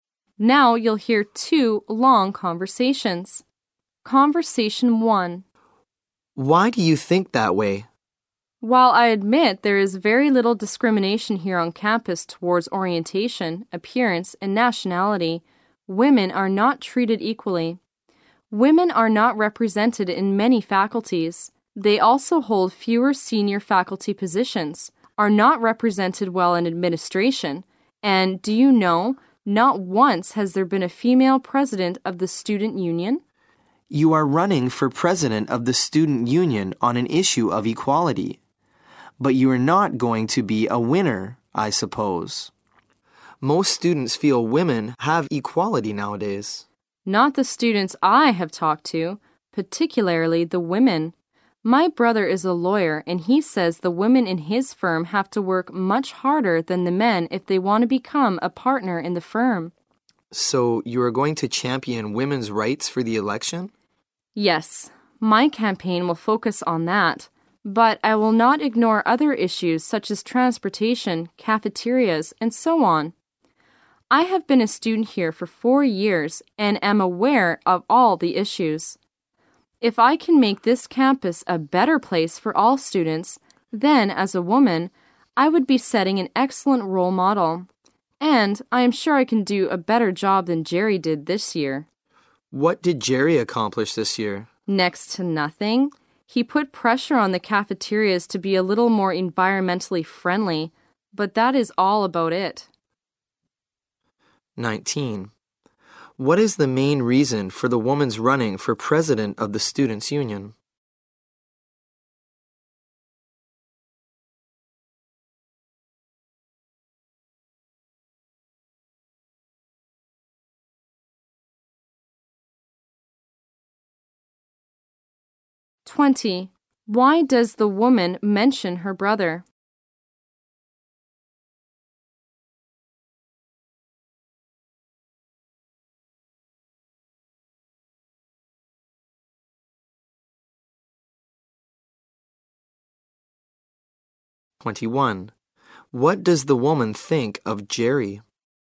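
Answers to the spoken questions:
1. To fight for equality for women.
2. To show that women are not treated equally.
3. He achieved next to nothing this year.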